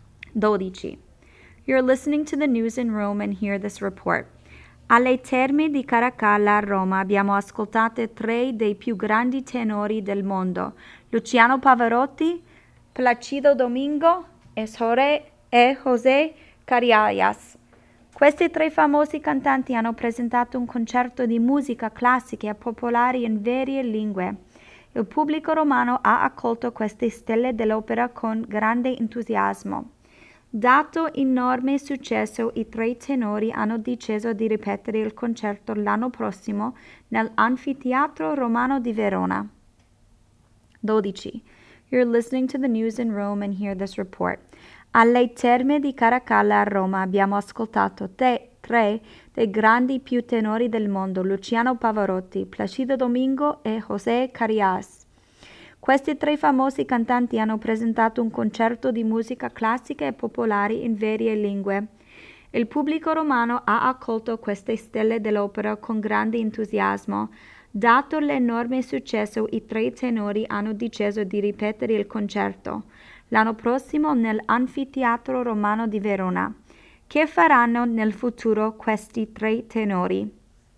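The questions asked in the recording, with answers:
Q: Che faranno nel futuro questi tre tenori?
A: Ripeteranno il concerto l'anno prossimo a Verona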